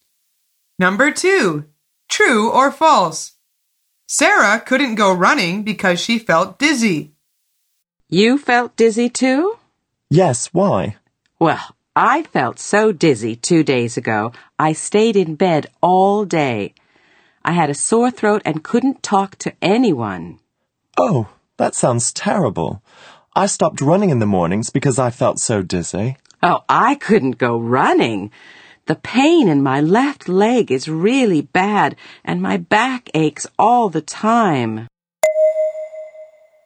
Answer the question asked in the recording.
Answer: The answer is false. She couldn't go running because of a pain in her leg and back.